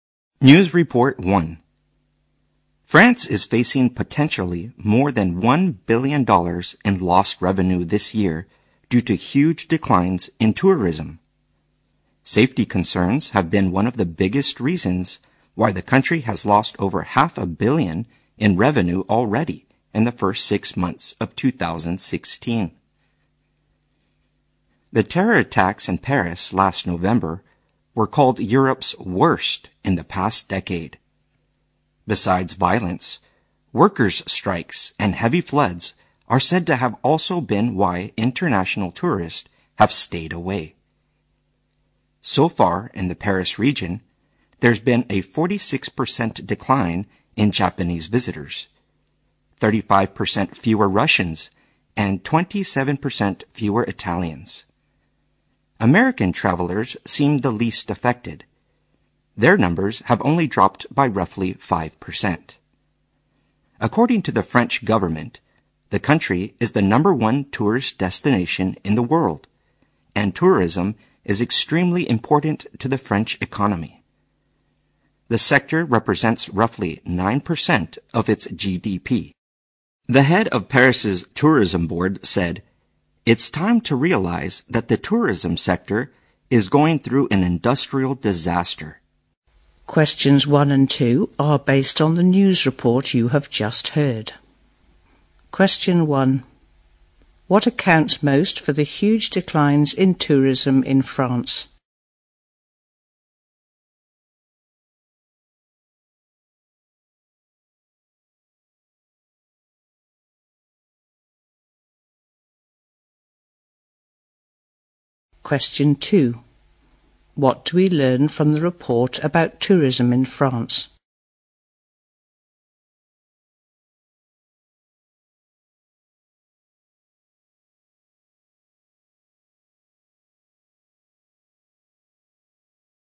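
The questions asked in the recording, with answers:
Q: What accounts most for the huge declines in tourism in France?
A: Safety concerns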